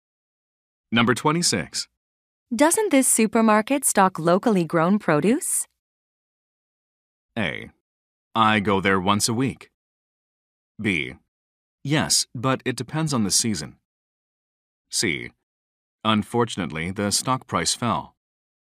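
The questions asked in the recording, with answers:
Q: Doesn't this supermarket stock locally grown produce?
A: B: Yes, but it depends on the season.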